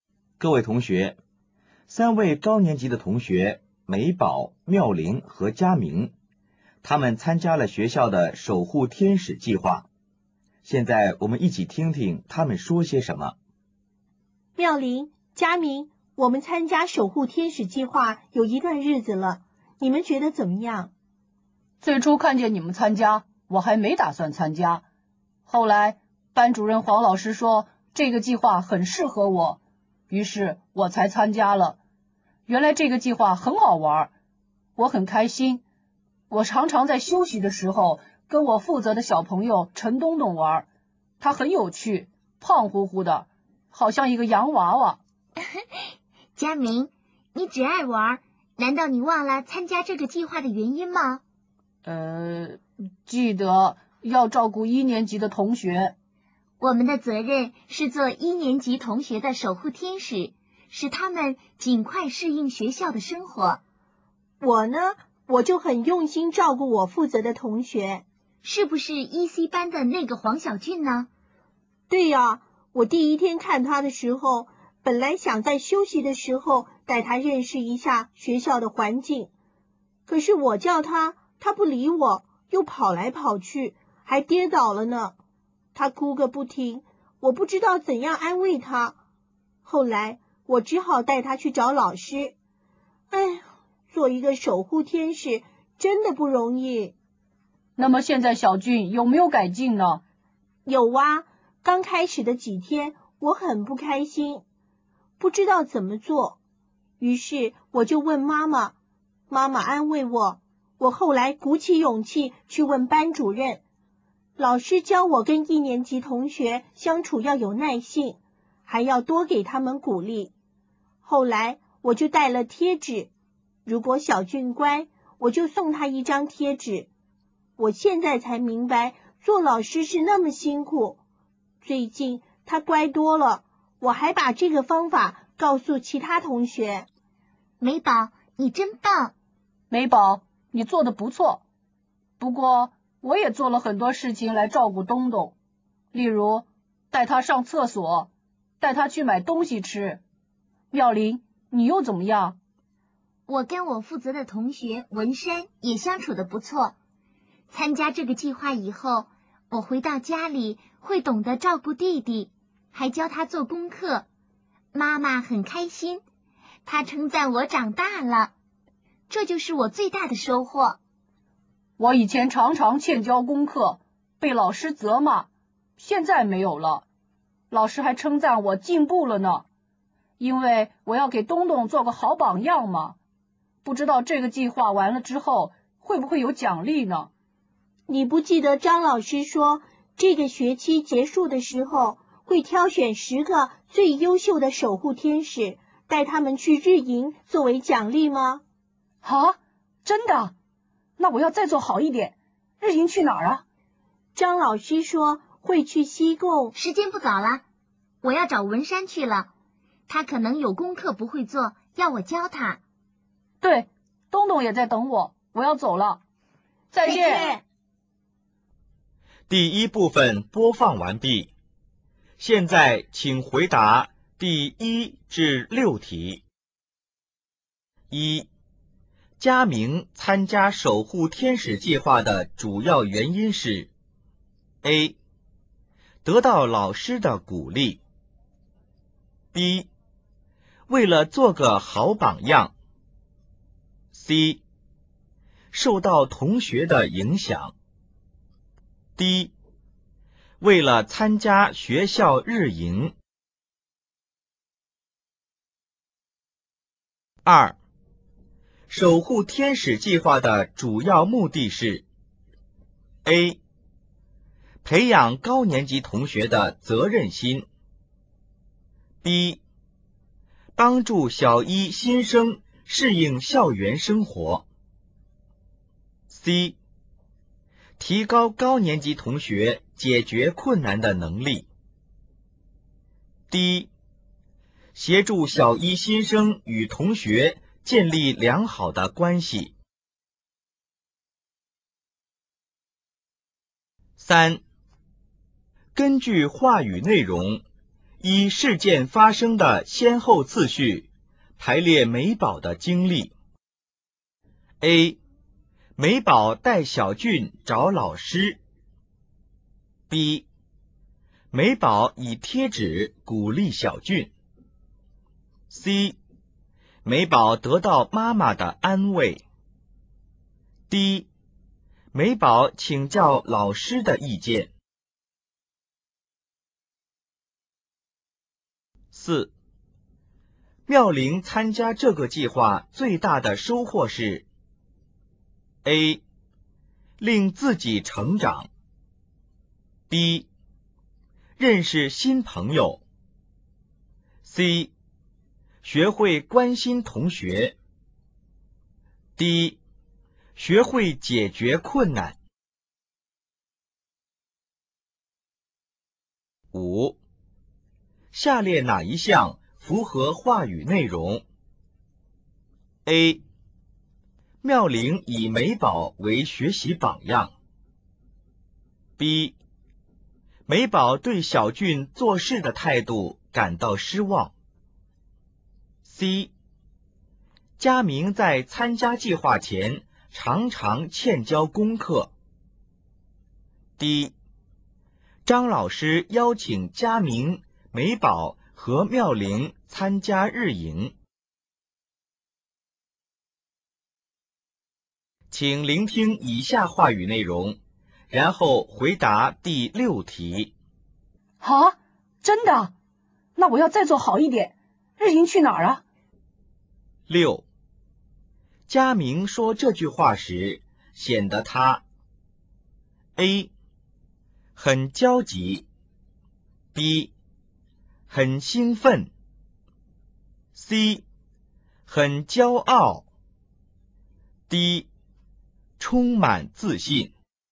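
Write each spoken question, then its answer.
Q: 守护天使计划的主要目的是 A.培养高年级同学的责任心 B. 帮助小一新生适应校园生活 C.提高高年级同学解决困难的能力 D. 协助小一新生与同学建立良好的关系。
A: B: 帮助小一新生适应校园生活

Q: 根据话语内容,依事件发生的先后次序,排列美宝的经历。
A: A、C、D、B

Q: 妙龄参加这个计划最大的收获是 A. 令自己成长。B. 认识新朋友。C.学会关心同学。D. 学会解决困难。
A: A: 令自己成长

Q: 下列哪一项符合话语内容 ?A. 妙龄以美宝为学习榜样。B. 美宝对小俊做事的态度感到失望。C. 佳明在参加计划前常常欠交功课。D. 张老师邀请佳明、美宝和妙龄参加日营。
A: C: 佳明在参加计划前常常欠交功课

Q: 佳明说这句话时显得他 A. 很焦急 B. 很兴奋 C.很骄傲 D. 充满自信。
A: B: 很兴奋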